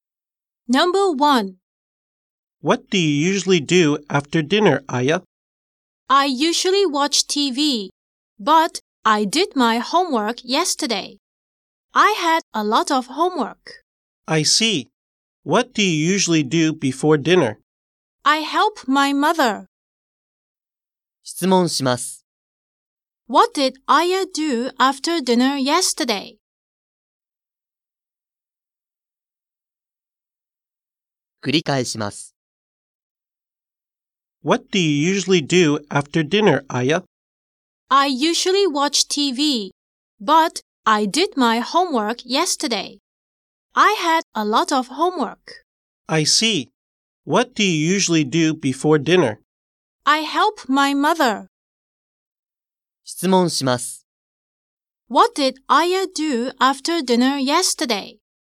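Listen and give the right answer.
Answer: She did her homework.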